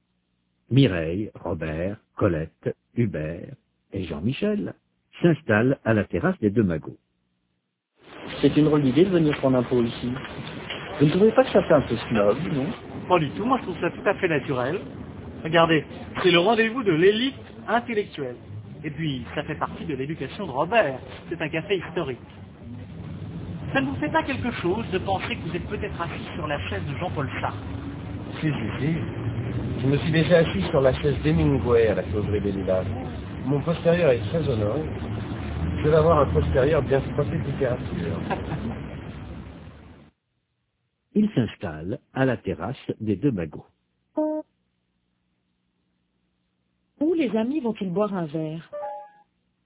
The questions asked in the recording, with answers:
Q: Où les amis vont-ils boire un verre?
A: Aux deux magots.